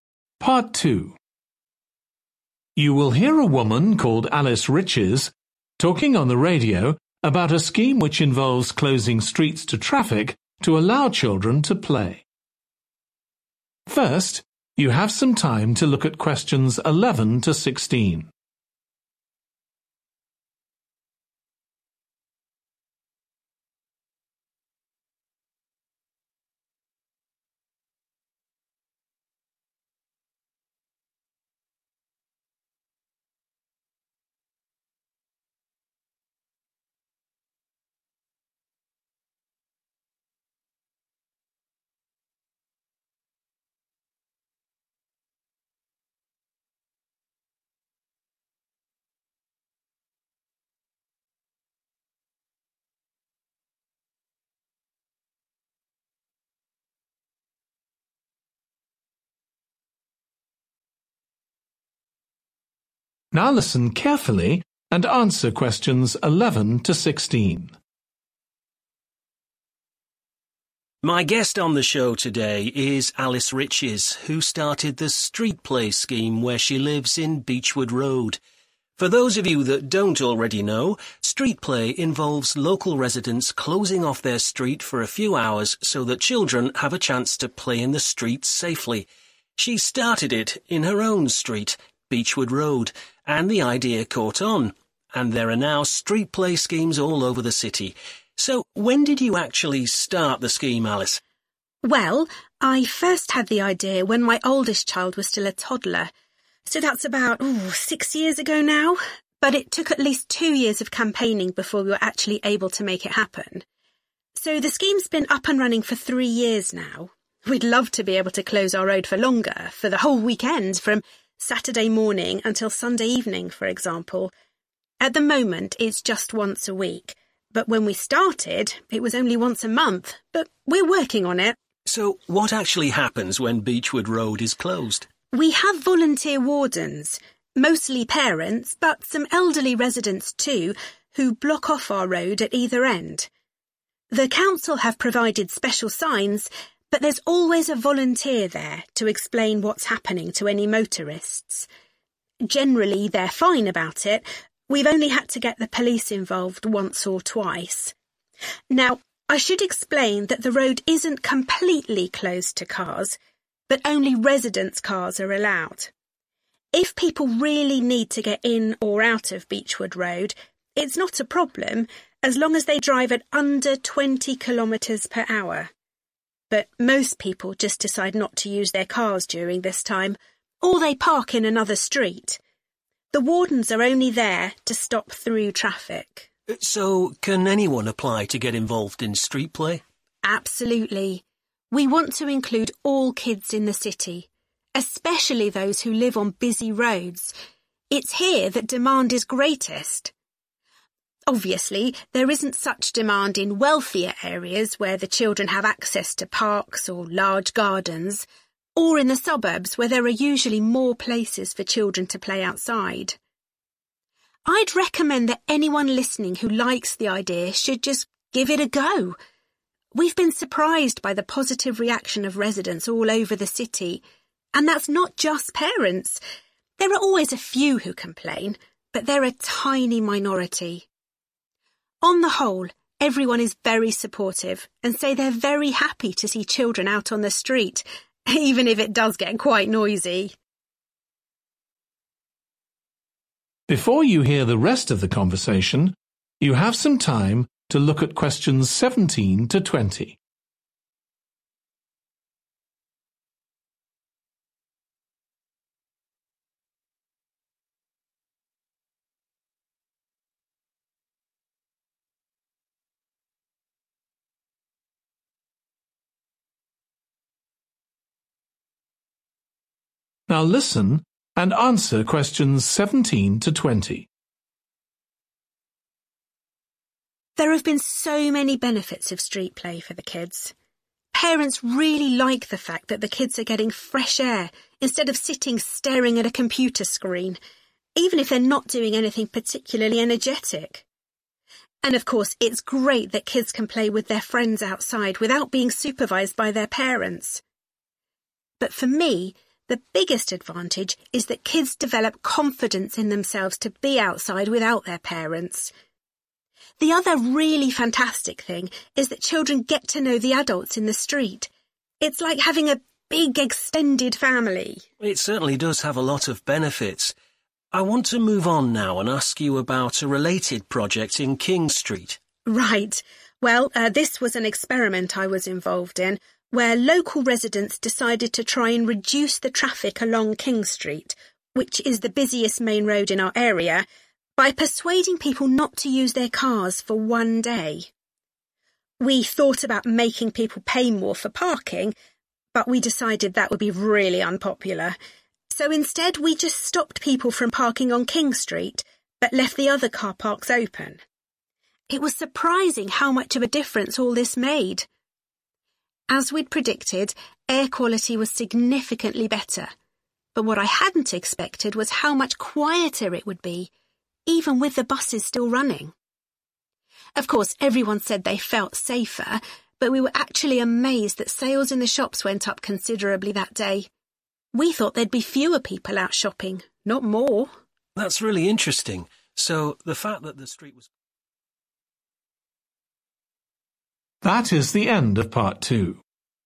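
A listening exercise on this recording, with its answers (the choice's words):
Choose the correct letter A, B or C.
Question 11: When did the Street Play Scheme first take place?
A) two years ago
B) three years ago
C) six years ago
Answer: three years ago

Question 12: How often is Beechwood Road closed to traffic now?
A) once a week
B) on Saturdays and Sundays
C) once a month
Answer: once a week

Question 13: Who is responsible for closing the road?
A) a council official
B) the police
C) local wardens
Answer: local wardens

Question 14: Residents who want to use their cars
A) have to park in another street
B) must drive very slowly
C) need permission from a warden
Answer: must drive very slowly

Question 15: Alice says that Street Play Schemes are most needed in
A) wealthy areas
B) quiet suburban areas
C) areas with heavy traffic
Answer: areas with heavy traffic

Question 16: What has been the reaction of residents who are not parents?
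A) many of them were unhappy at first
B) they like seeing children play in the street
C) they are surprised by the lack of noise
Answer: they like seeing children play in the street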